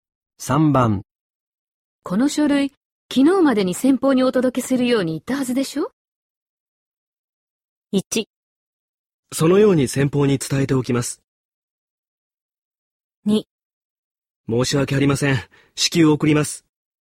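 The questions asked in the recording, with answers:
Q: この書類昨日までに先方にお届けするように言ったはずでしょ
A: 2: 申し訳ありません。至急送ります。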